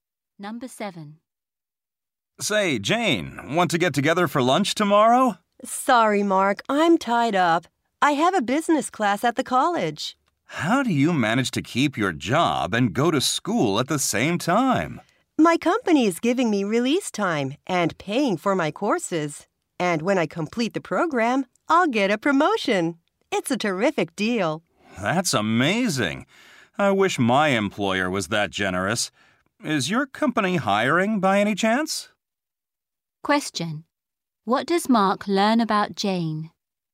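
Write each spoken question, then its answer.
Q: What does Mark learn about Jane?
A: Her company pays for her courses and gives her time off to study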